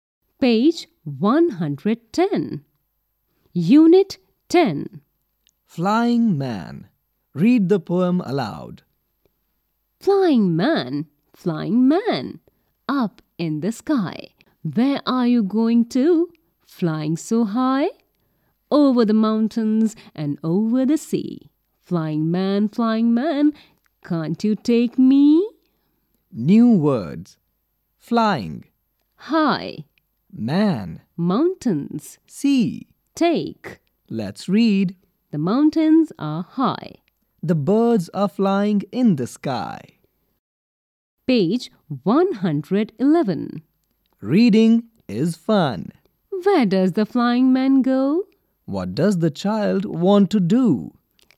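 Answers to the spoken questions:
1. Over the mountains and over the sea
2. To be taken along with the flying man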